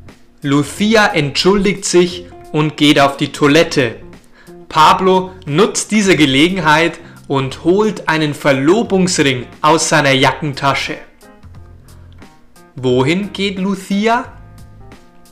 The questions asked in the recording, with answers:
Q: Wohin geht Lucia?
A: Auf die Toilette. Lucia geht auf die Toilette.